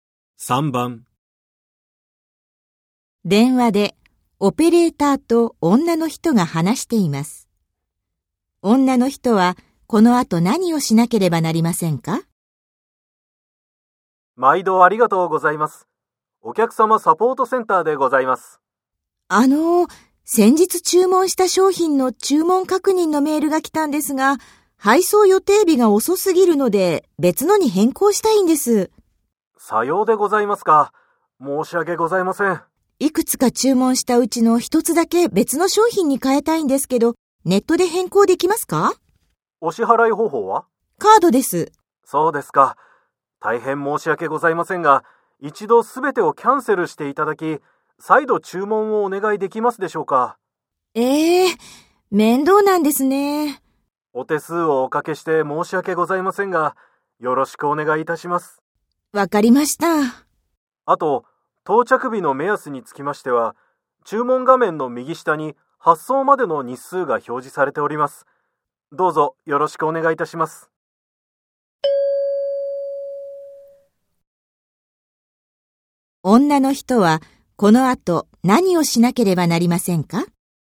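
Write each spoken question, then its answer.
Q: 女の人はこの後何をしなければなりませんか?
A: 注文をすべてキャンセルして、もう一度注文する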